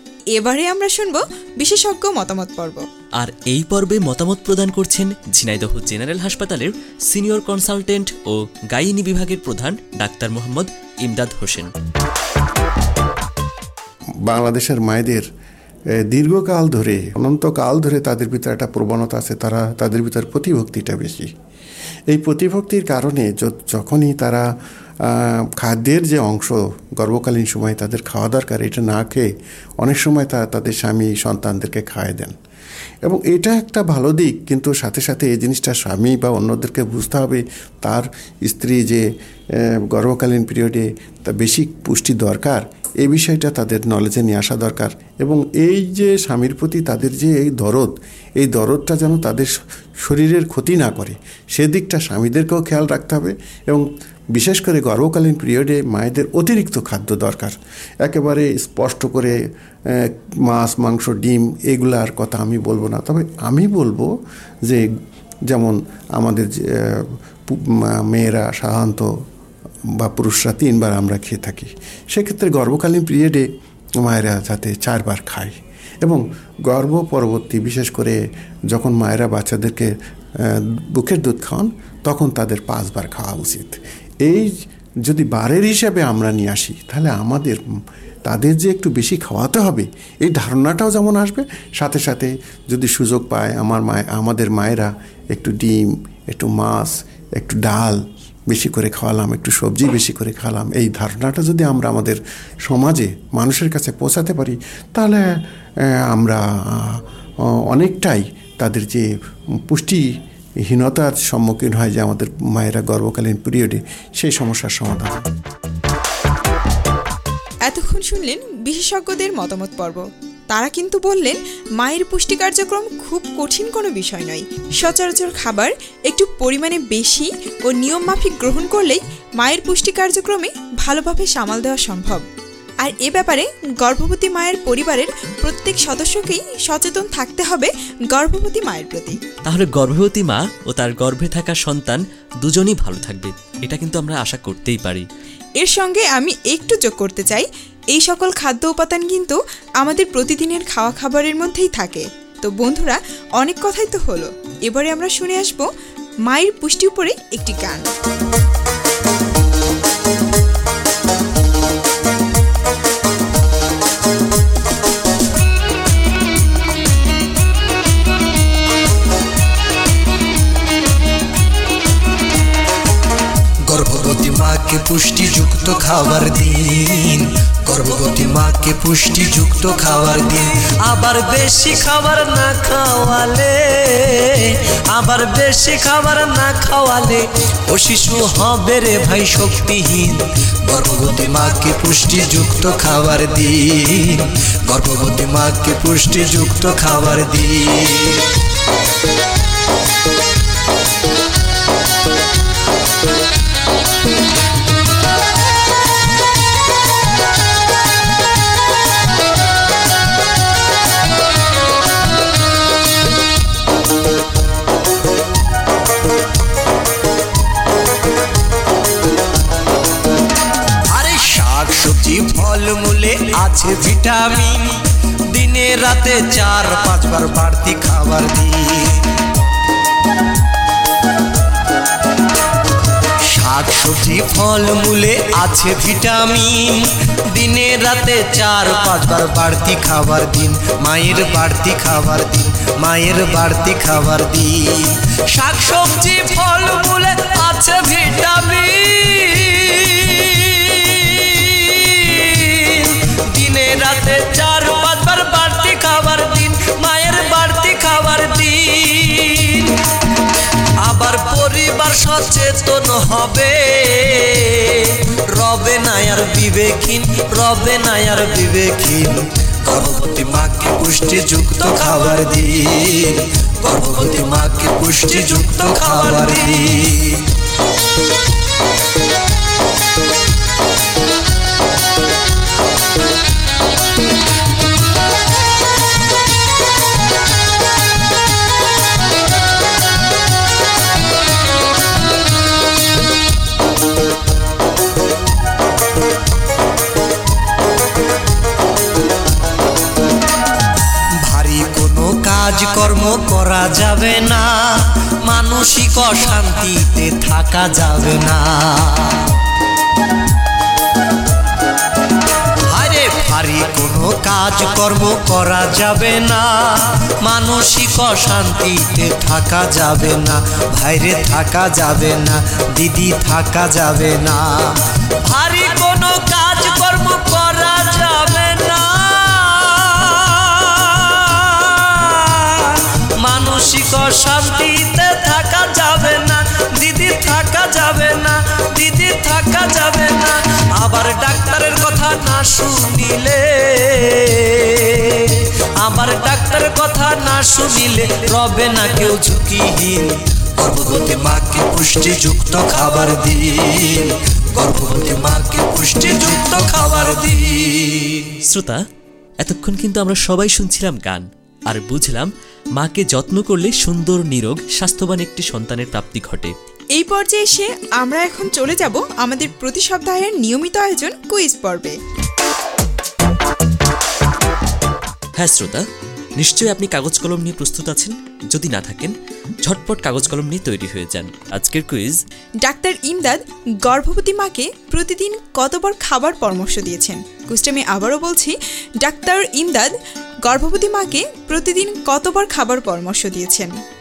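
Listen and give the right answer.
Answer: চারবার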